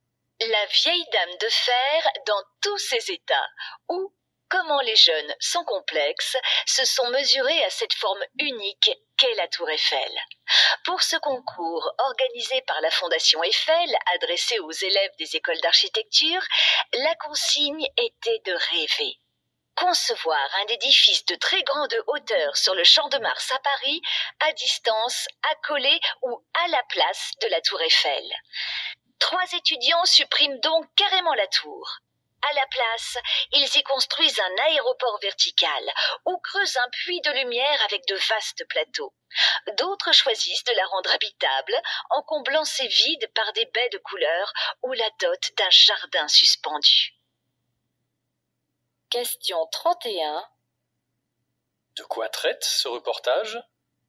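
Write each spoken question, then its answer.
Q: De quoi traite ce reportage ?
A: D'un concours de la Fondation Eiffel où des étudiants en architecture imaginent un édifice de très grande hauteur sur le Champ de Mars, à côté ou à la place de la tour Eiffel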